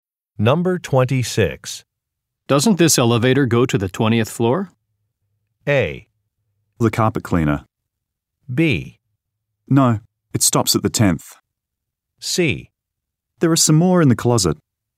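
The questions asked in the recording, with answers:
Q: Doesn't this elevator go to the 20th floor?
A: B: No, it stops at the 10th.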